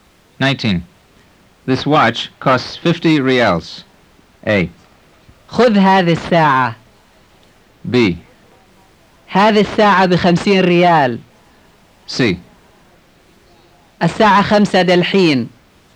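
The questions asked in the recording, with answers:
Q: This watch costs 50 reals.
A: B: هذه الساعة بخمسين ريال.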